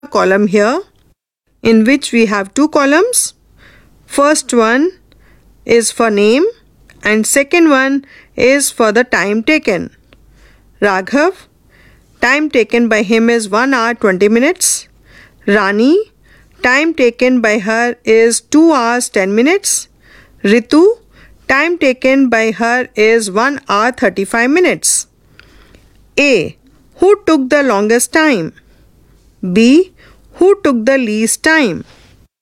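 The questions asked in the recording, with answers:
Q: Who took the longest time?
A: Rani

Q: Who took the least time?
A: Raghav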